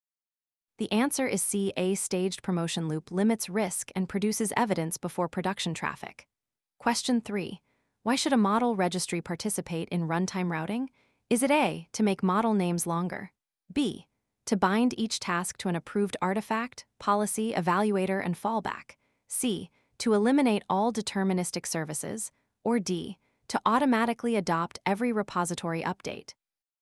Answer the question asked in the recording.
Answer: The answer is B, the registry prevents unapproved artifacts from silently entering a production graph.